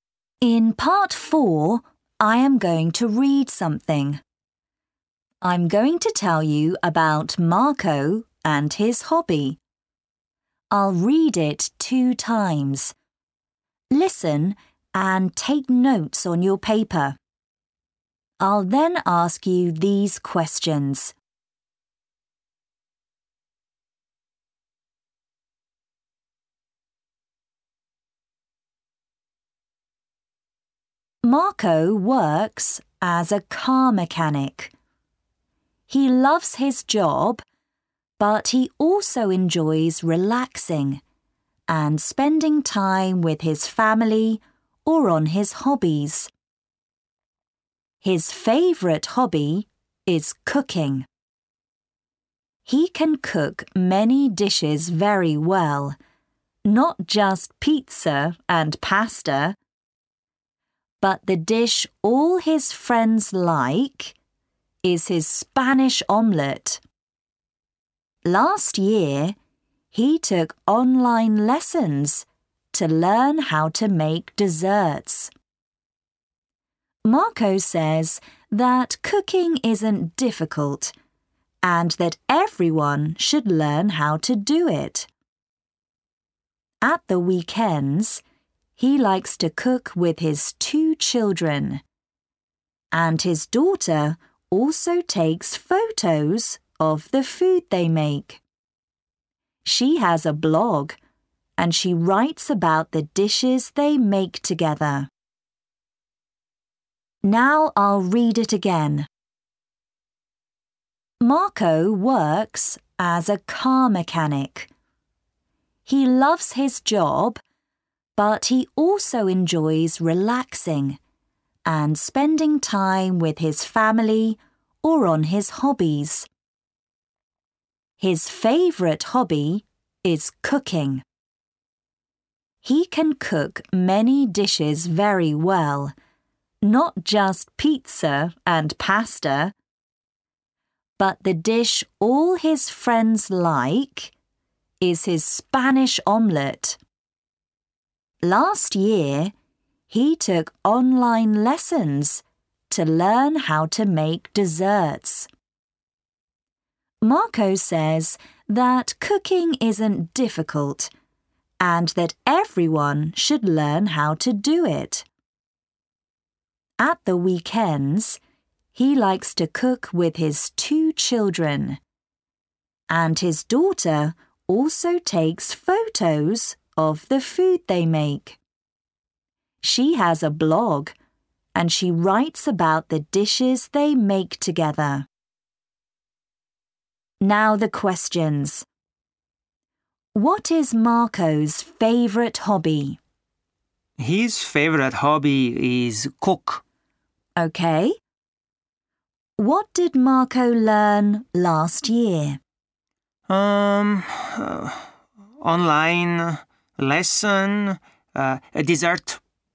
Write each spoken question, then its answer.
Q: What is Marco's favourite hobby?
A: His favourite hobby is cook.